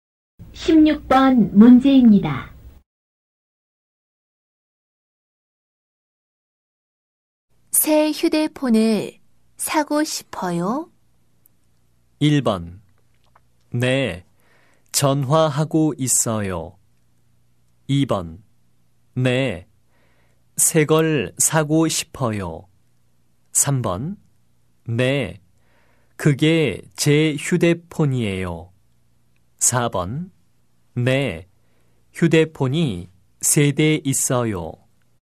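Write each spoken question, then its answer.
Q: 새 휴대폰을 사고 싶어요?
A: 2: 네, 새 걸 사고 싶어요.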